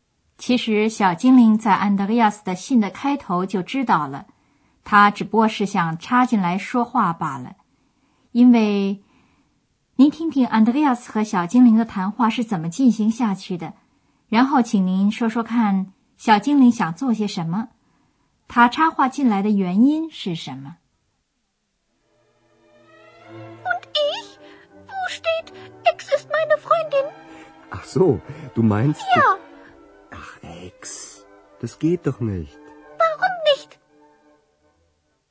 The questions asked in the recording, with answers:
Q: 然后请您说说看,小精灵想做些什么?他插话进来的原因是什么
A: 小精灵的意思是 ,Andreas 在信里也应该把他提上一笔。